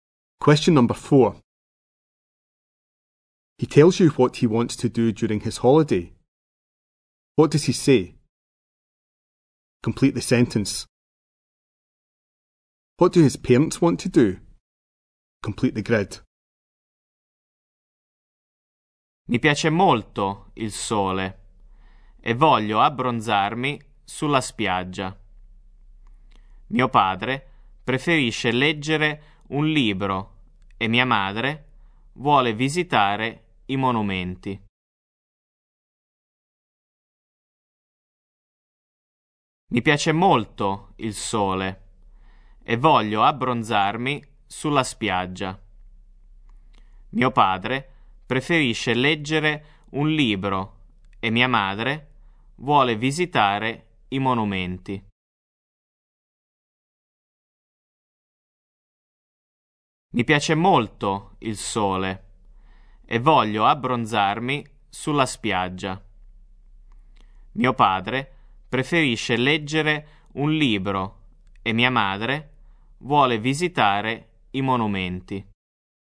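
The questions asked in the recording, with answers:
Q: What do his parents want to do?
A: Father wants to read a book; mother wants to visit the monuments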